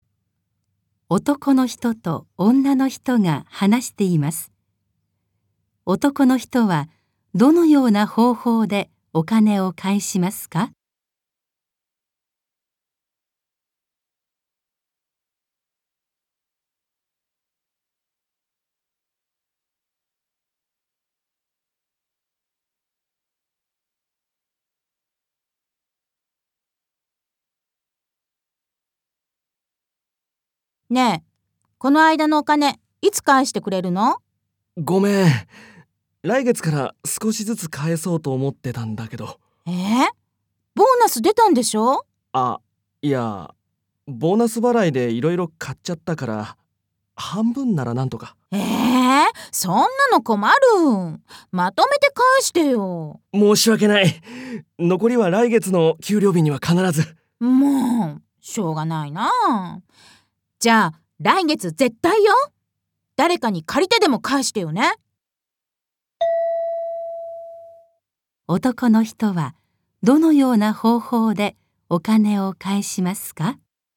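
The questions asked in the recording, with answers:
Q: 男の人はどのような方法でお金を返しますか?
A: 今ボーナスで半分返し、残りは来月の給料日に返す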